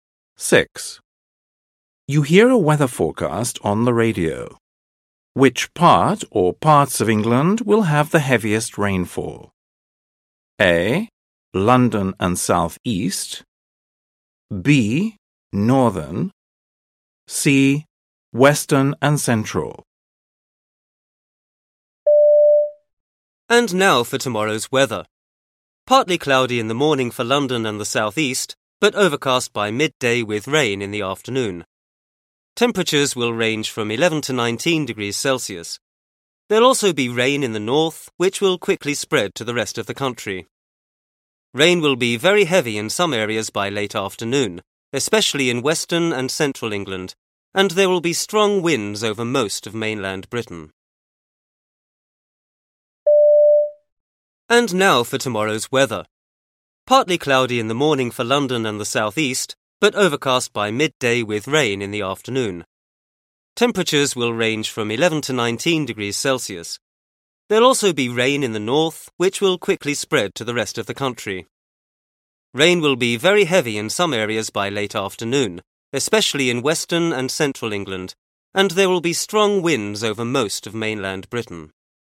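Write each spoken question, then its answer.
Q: Which part or parts of England will have the heaviest rainfall?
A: C: Western and Central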